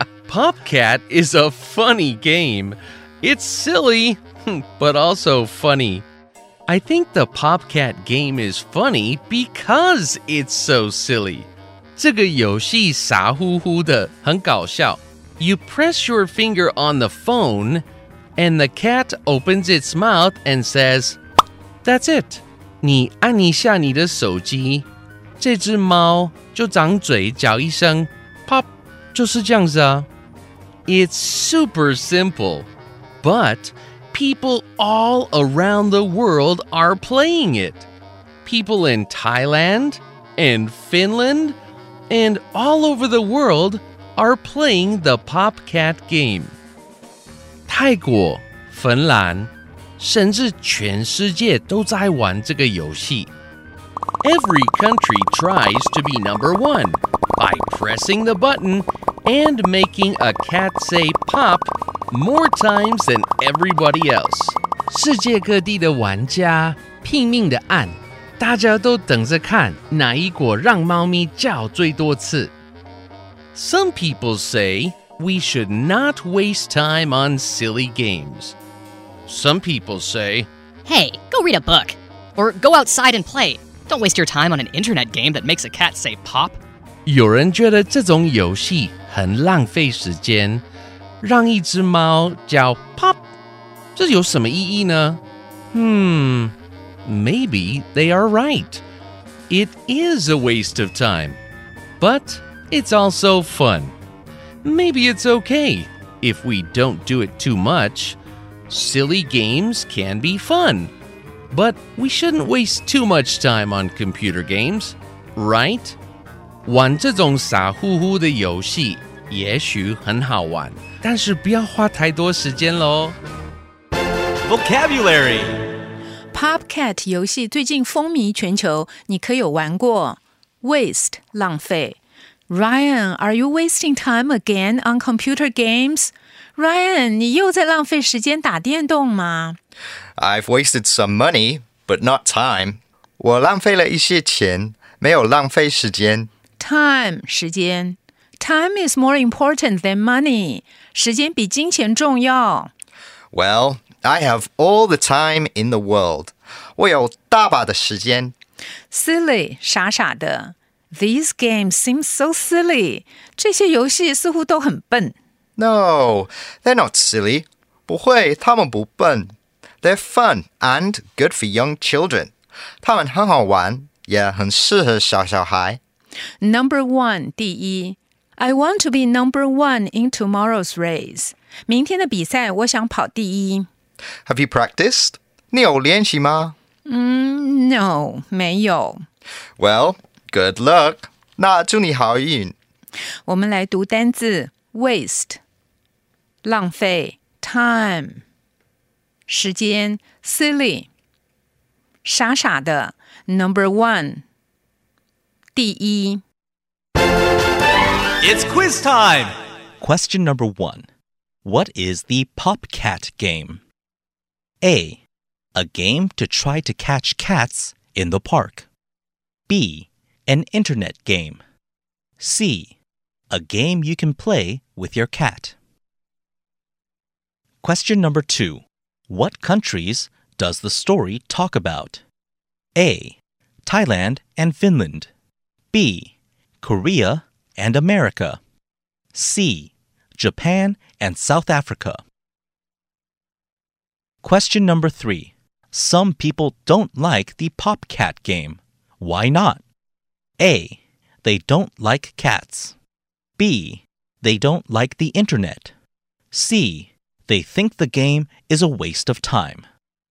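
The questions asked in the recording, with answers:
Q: What is the PopCat game?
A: B: An internet game.

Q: What countries does the story talk about?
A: A: Thailand and Finland.

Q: Some people don't like the PopCat game. Why not?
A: C: They think the game is a waste of time.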